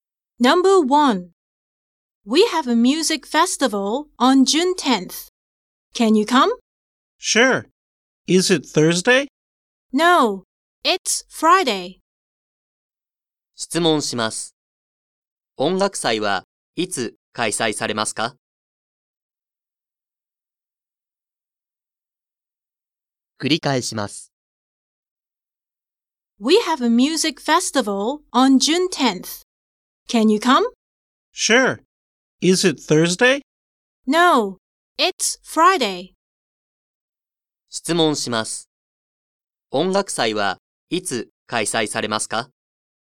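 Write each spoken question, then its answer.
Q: 音楽祭はいつ開催されますか?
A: 6月10日の金曜日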